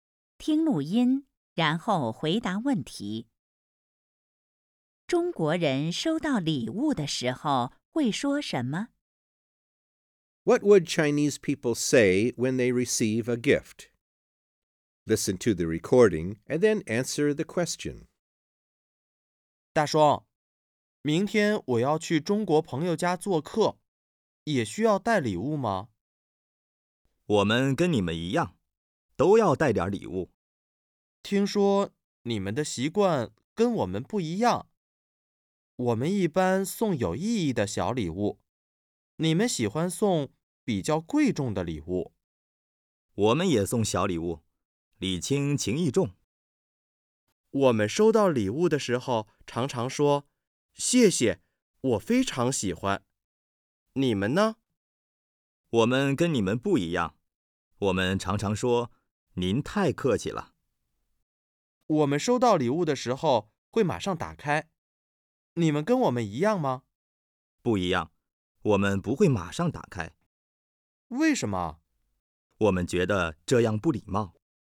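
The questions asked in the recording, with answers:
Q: 中国人收到礼物的时候会说什么?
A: 您太客气了。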